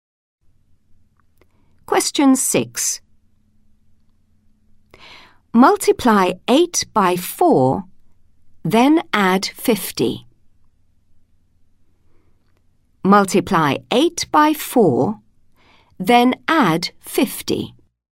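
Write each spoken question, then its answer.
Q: Multiply 8 by 4, then add 50.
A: 82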